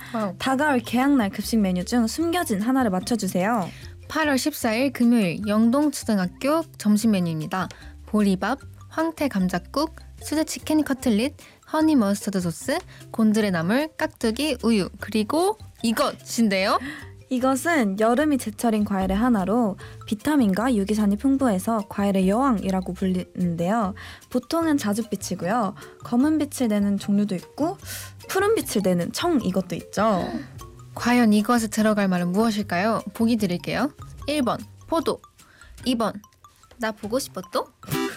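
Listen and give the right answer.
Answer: 1번: 포도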